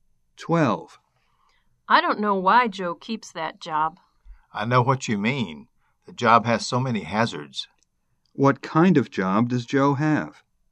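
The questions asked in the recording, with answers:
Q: What kind of job does Joe have?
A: A dangerous job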